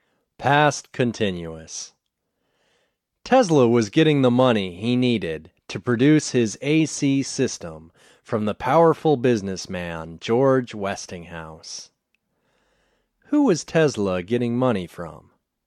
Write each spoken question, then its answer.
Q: Who was Tesla getting money from?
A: Tesla was getting money from George Westinghouse.